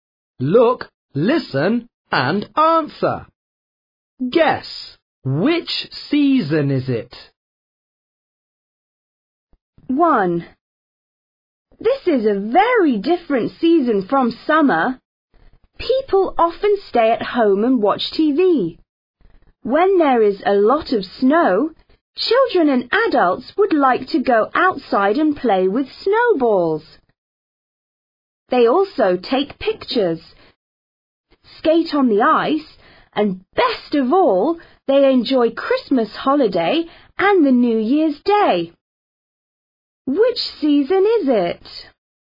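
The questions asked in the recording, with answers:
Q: Which season is it?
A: winter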